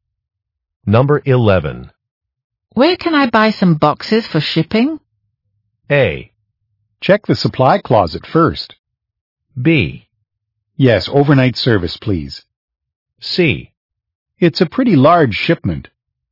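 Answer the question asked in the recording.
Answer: A: Check the supply closet first.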